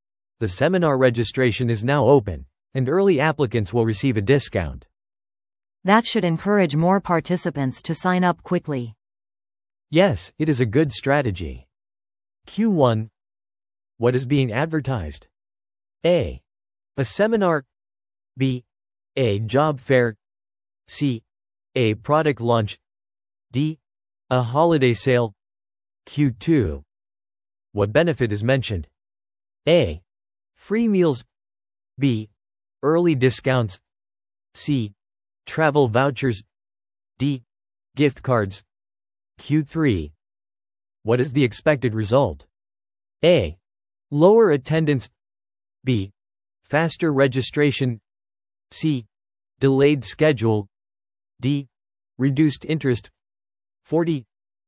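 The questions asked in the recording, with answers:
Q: What is being advertised?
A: A: A seminar.

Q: What benefit is mentioned?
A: B: Early discounts.

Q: What is the expected result?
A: B: Faster registration.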